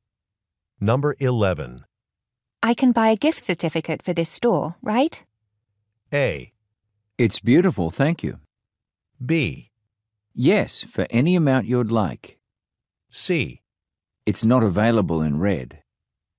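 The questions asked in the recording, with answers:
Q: I can buy a gift certificate for this store, right?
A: B: Yes, for any amount you'd like.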